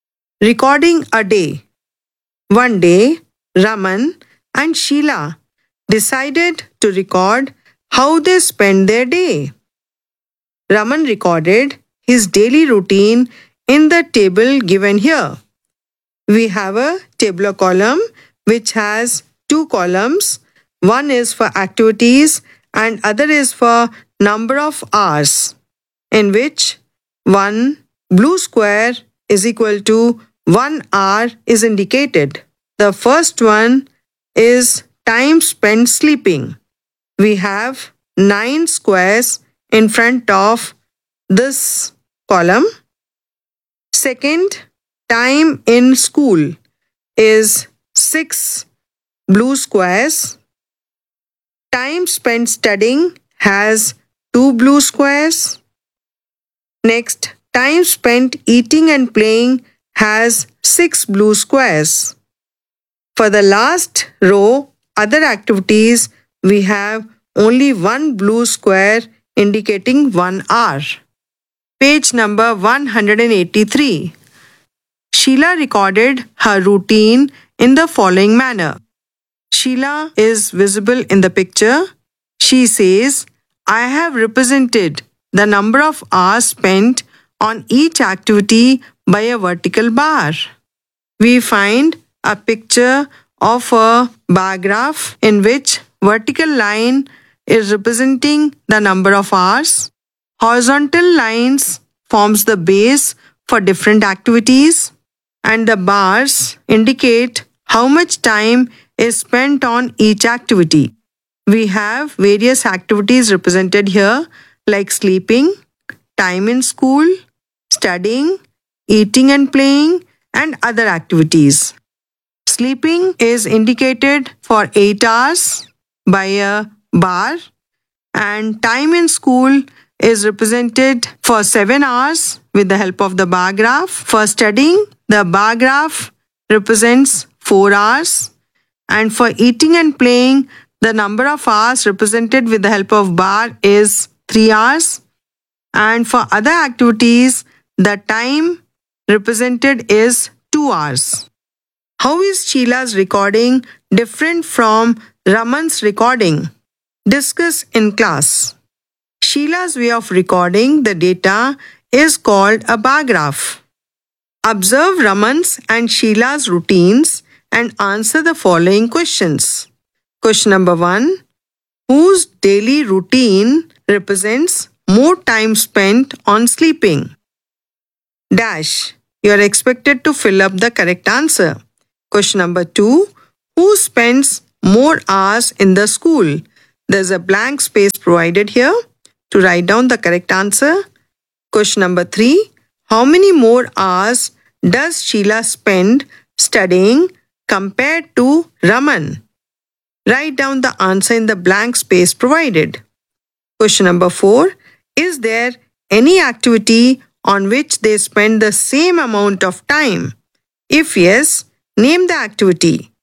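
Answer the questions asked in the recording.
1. Raman's
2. Sheila
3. 2 hours
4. No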